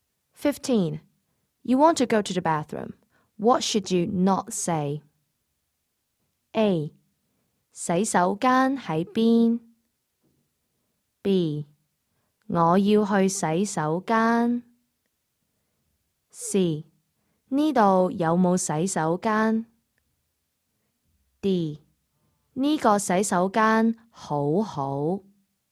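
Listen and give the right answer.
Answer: D: 呢个洗手间好好?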